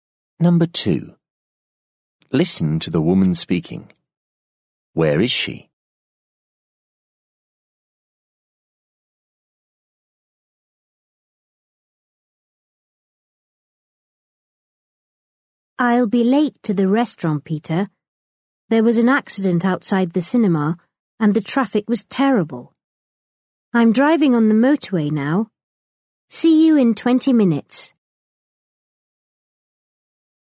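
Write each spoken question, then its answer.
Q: Where is she?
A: In her car on the motorway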